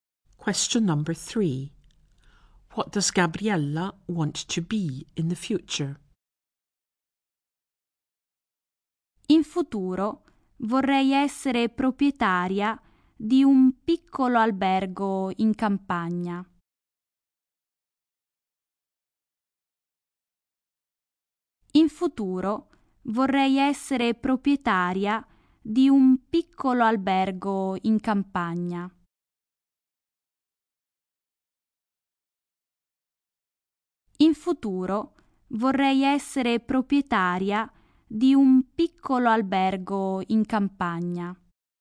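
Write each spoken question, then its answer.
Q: What does Gabriella want to be in the future?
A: The owner of a small hotel in the countryside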